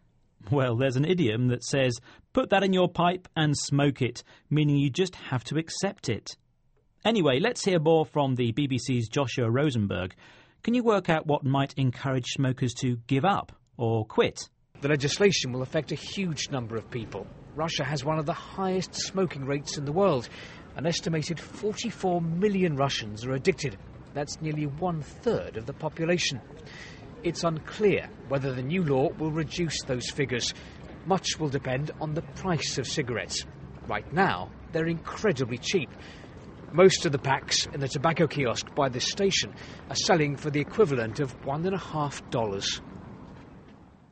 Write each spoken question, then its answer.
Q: Can you work out what might encourage smokers to give up or quit?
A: So, to help people stop smoking, prices need to rise.